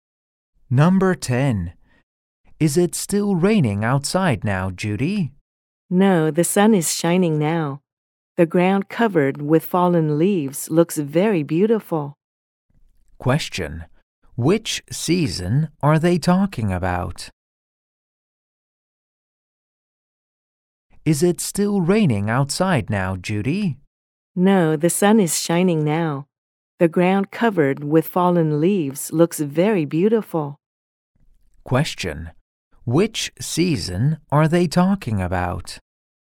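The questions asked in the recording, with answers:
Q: Which season are they talking about?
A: Autumn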